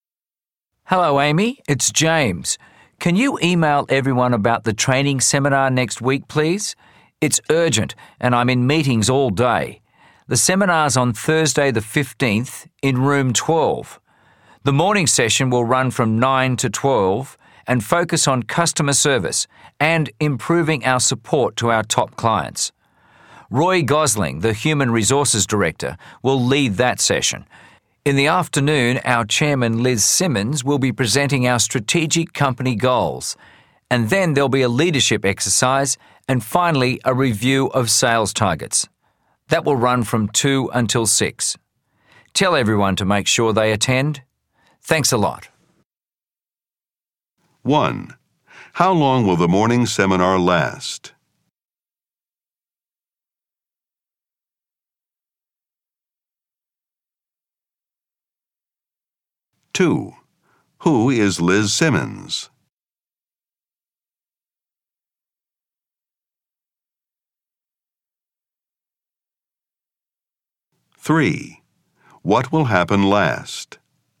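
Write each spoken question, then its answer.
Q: How long will the morning seminar last?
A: Three hours (9 to 12)

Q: Who is Liz Simmons?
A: The company chairman

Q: What will happen last?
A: A review of sales targets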